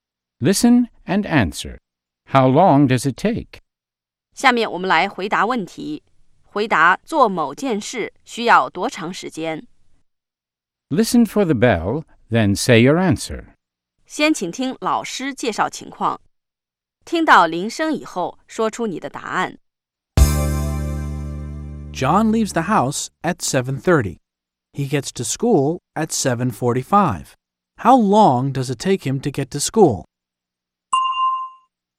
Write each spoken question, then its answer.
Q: How long does it take him to get to school?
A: It takes him 15 minutes. It takes him 15 minutes to get to school.